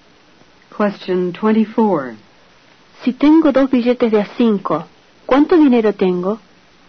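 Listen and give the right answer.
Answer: 10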